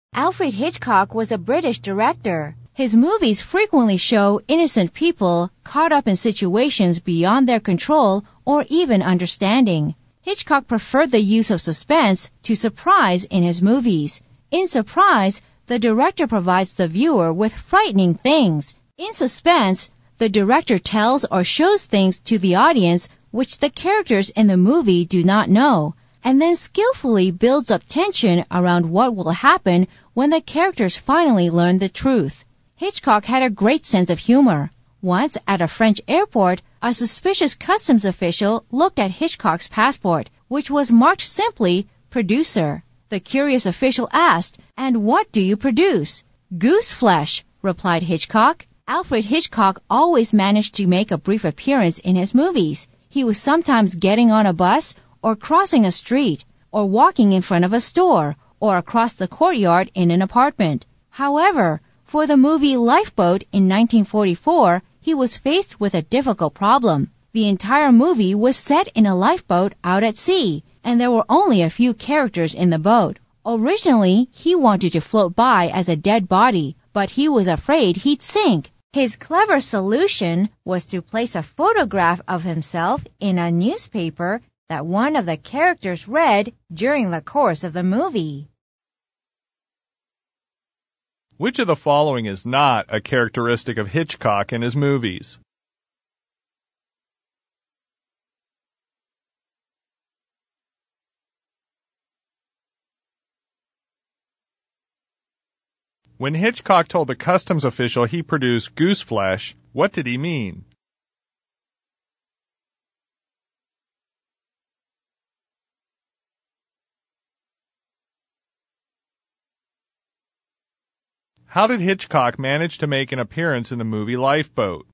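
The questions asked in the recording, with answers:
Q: When Hitchcock told the customs official he produced goose flesh, what did he mean?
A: His films frighten people (give them goosebumps).

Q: How did Hitchcock manage to make an appearance in the movie Lifeboat?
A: A photograph of him appeared in a newspaper that one of the characters read.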